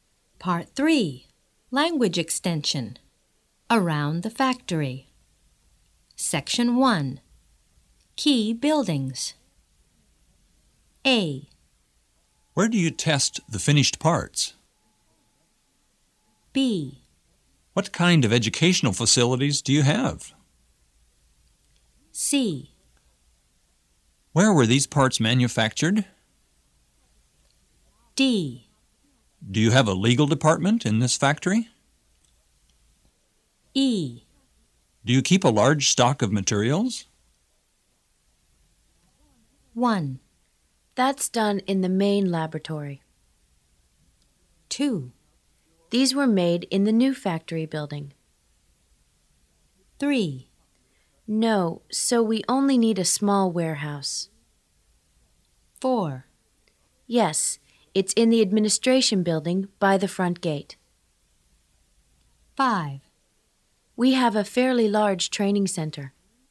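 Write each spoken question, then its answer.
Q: That's done in the main laboratory.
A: A: Where do you test the finished parts?

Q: These were made in the new factory building.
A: C: Where were these parts manufactured?

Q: No, so we only need a small warehouse.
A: E: Do you keep a large stock of materials?

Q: Yes, it's in the administration building by the front gate.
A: D: Do you have a legal department in this factory?

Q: We have a fairly large training center.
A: B: What kind of educational facilities do you have?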